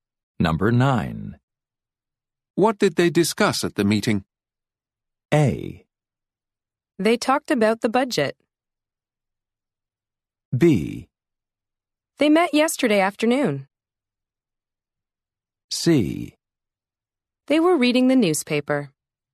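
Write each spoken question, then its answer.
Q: What did they discuss at the meeting?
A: A: They talked about the budget.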